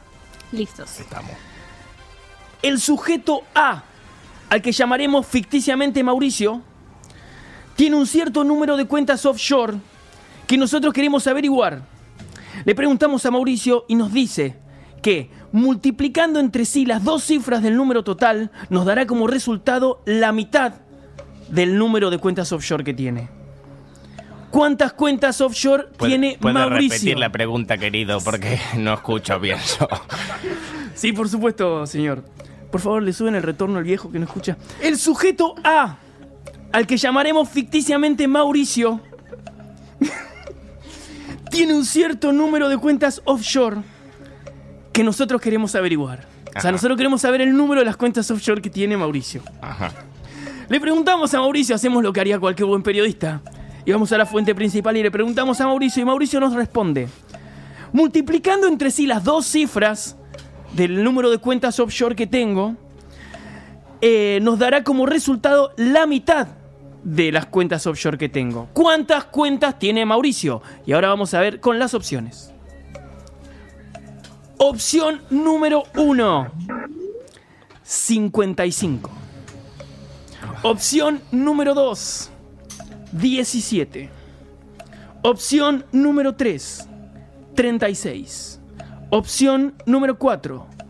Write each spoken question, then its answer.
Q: ¿Cuántas cuentas tiene Mauricio?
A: 36.